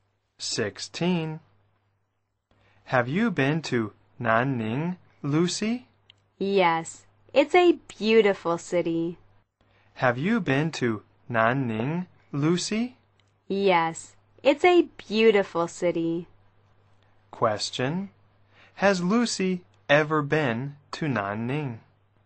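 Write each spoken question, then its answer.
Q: Has Lucy ever been to Nanning?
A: Yes, she has.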